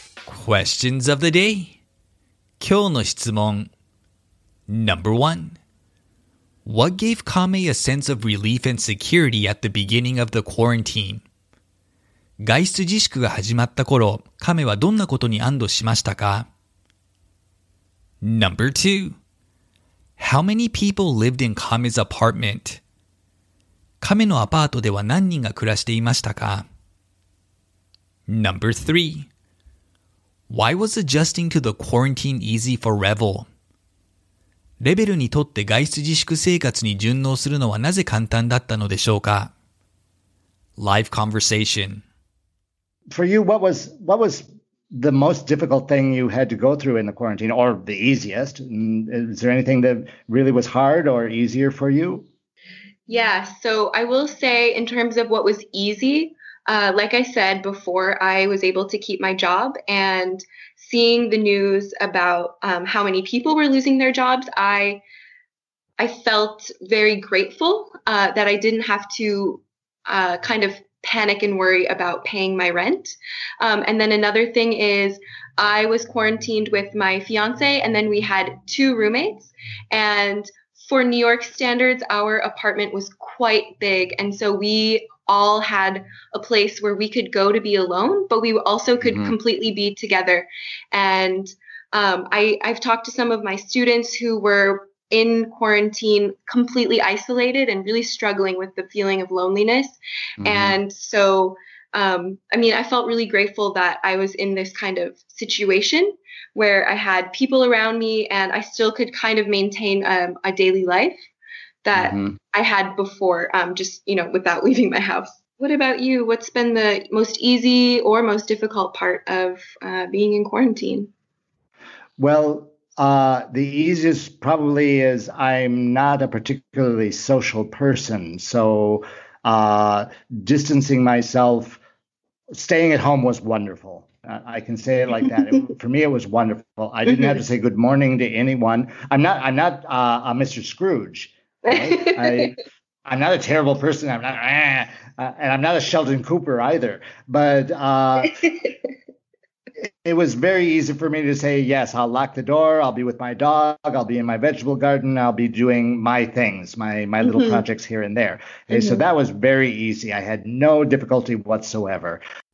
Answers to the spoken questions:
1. She learned she would keep her full-time job and would not have to worry about paying rent.
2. Four people lived in Kame's apartment.
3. Revel is not typically a very social person, so enjoyed the quiet time at home during quarantine.